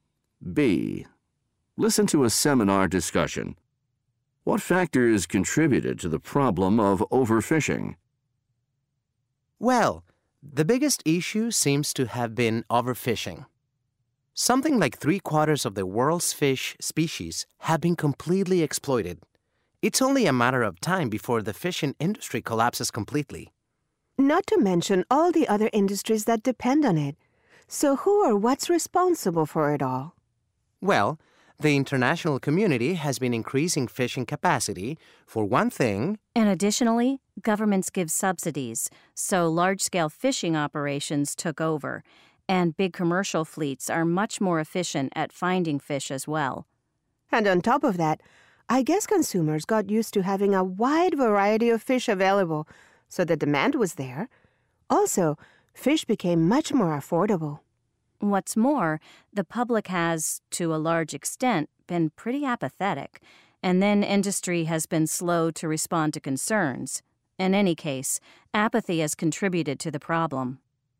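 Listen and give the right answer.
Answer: Increased international fishing capacity, government subsidies, efficient large commercial fleets, consumer demand for a variety of affordable fish, public apathy and slow industry response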